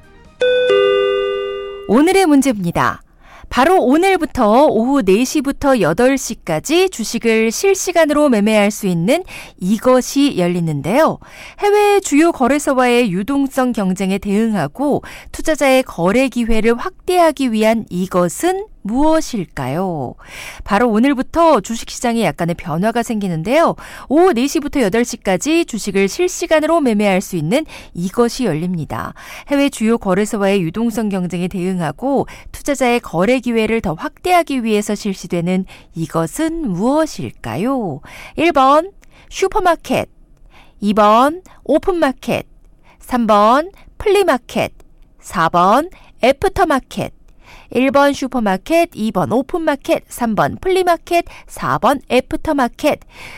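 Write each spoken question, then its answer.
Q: 해외 주요 거래소와의 유동성 경쟁에 대응하고 투자자의 거래 기회를 더 확대하기 위해서 실시되는 이것은 무엇일까요?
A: 4: 애프터마켓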